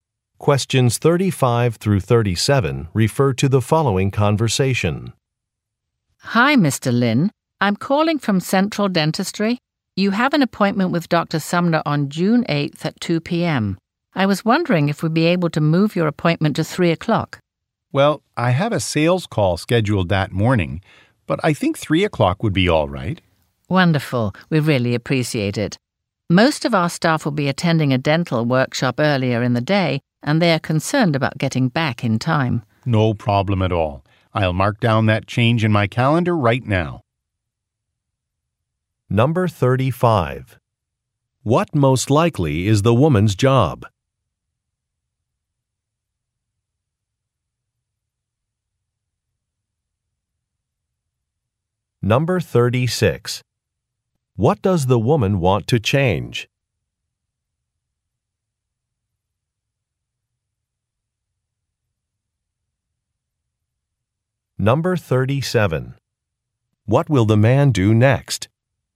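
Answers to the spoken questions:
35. Receptionist at a dental office
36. The appointment time
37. Mark the change in his calendar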